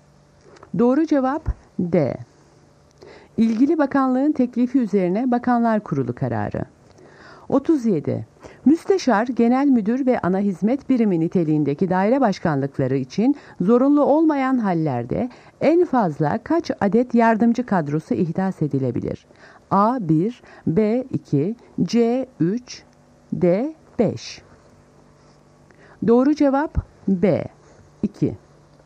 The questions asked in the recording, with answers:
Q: Müsteşar, genel müdür ve ana hizmet birimi niteliğindeki daire başkanlıkları için zorunlu olmayan hallerde en fazla kaç adet yardımcı kadrosu ihdas edilebilir?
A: Doğru cevap B-2.